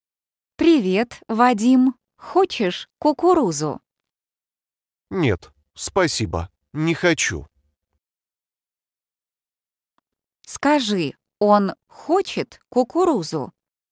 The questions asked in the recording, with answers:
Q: Скажи, он хочет кукурузу?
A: нет, не хочет.